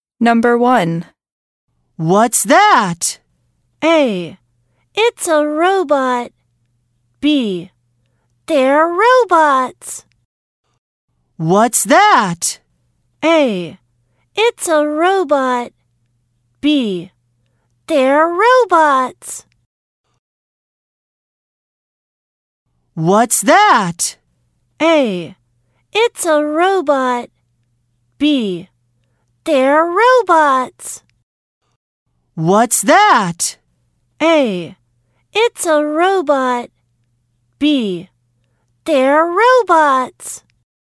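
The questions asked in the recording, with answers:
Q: What's that?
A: A: It's a robot.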